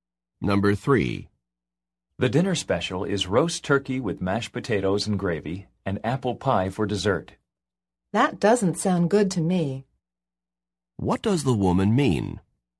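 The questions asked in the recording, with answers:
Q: What does the woman mean?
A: She doesn't want the dinner special.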